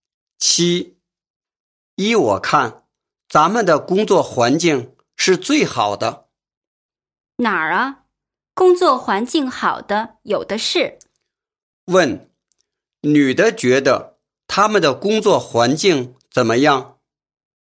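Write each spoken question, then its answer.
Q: 问,女的觉得他们的工作环境怎么样?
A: 不是最好的,比他们好的有很多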